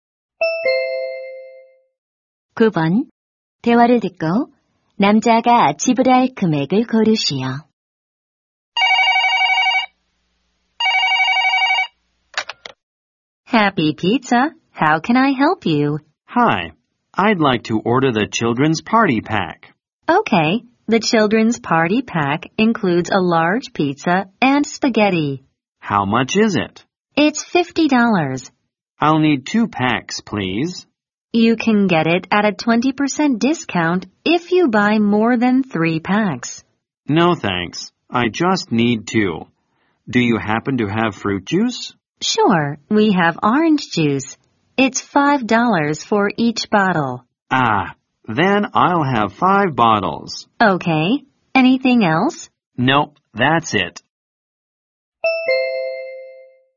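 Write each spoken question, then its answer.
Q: 대화를 듣고 남자가 지불할 금액을 고르시오.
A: 125달러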